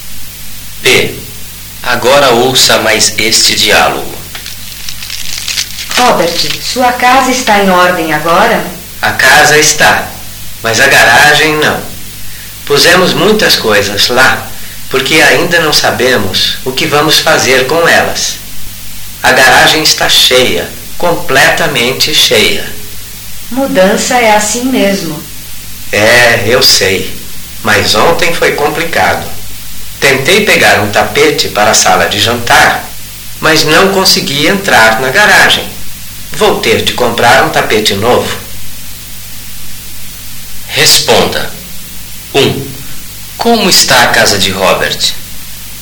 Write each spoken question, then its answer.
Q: Como está a casa de Robert?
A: A casa de Robert está em ordem.